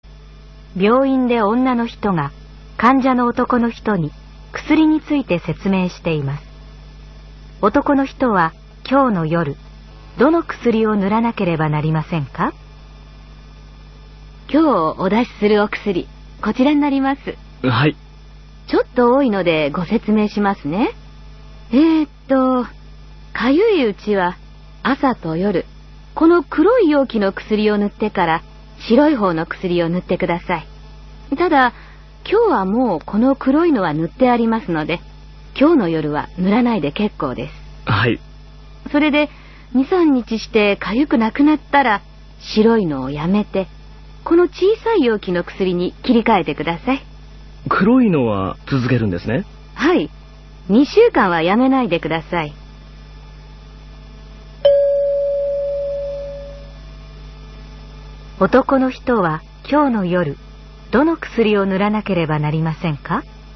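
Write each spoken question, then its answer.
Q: 男の人は今日の夜どの薬を塗らなければなりませんか?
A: 白い容器の薬だけ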